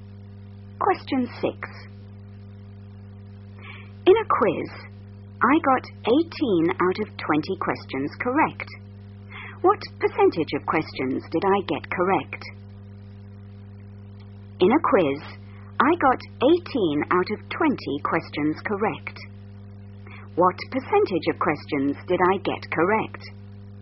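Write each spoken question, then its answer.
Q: What percentage of questions did I get correct?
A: 90%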